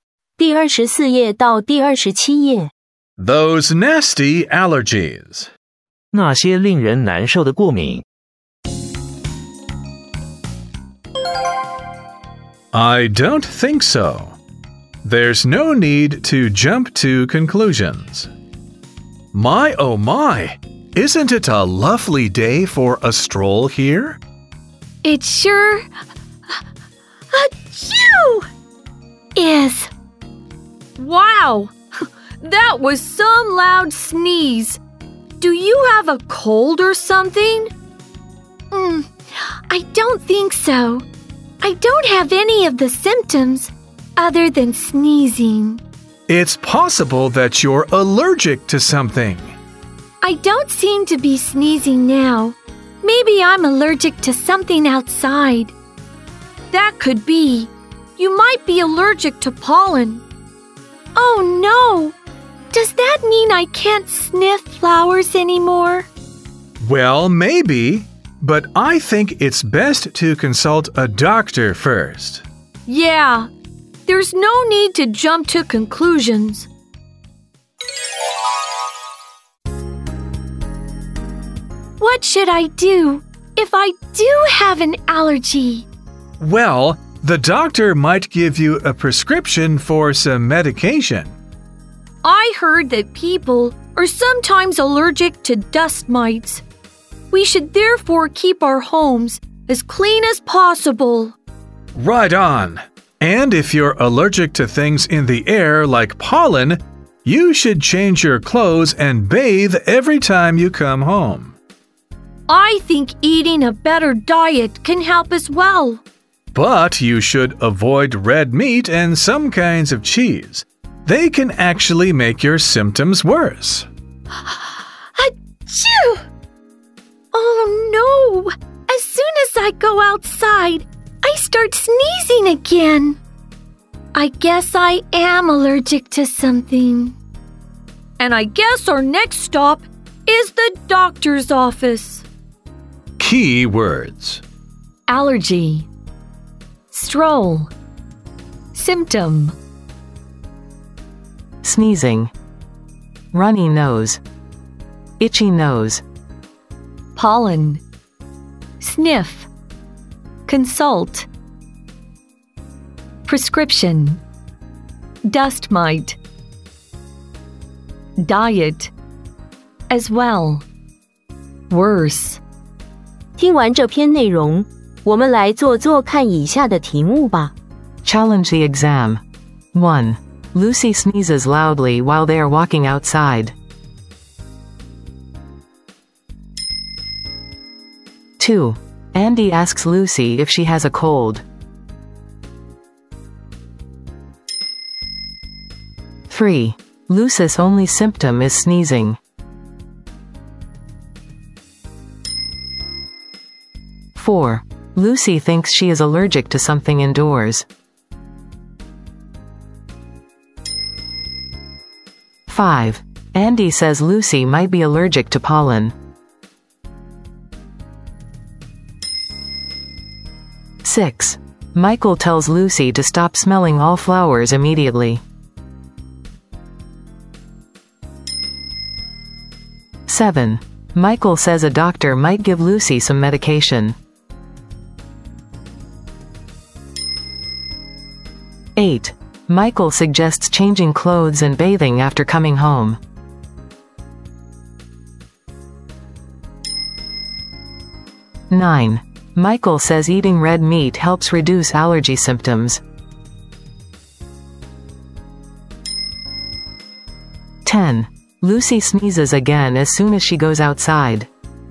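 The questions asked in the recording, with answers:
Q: Lucy sneezes loudly while they are walking outside.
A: True

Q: Lucy's only symptom is sneezing.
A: True

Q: Lucy thinks she is allergic to something indoors.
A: False

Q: Michael tells Lucy to stop smelling all flowers immediately.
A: False

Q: Michael says eating red meat helps reduce allergy symptoms.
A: False

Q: Lucy sneezes again as soon as she goes outside.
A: True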